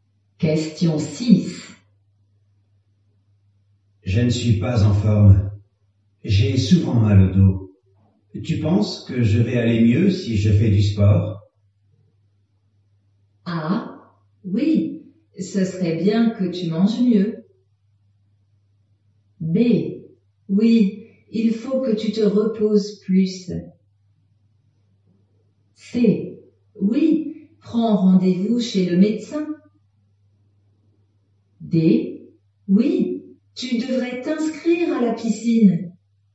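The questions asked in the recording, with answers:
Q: Tu penses que je vais aller mieux si je fais du sport?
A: D: Oui, tu devrais t'inscrire à la piscine.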